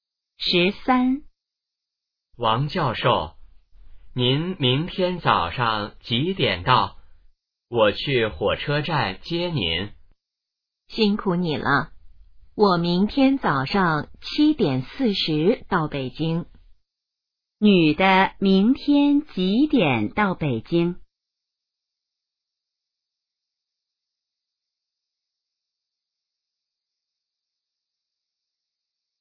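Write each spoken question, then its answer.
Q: 女的明天几点到北京?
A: 早上7:40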